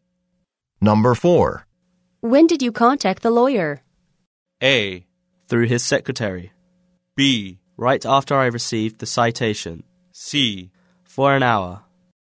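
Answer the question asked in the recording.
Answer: B: Right after I received the citation.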